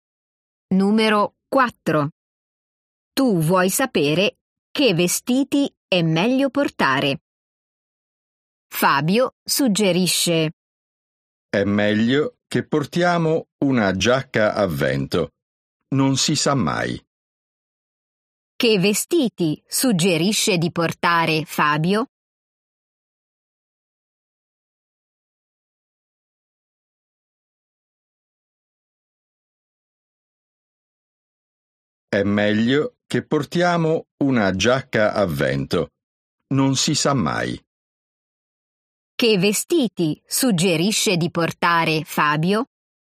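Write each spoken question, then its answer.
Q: Che vestiti suggerisce di portare Fabio?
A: Una giacca a vento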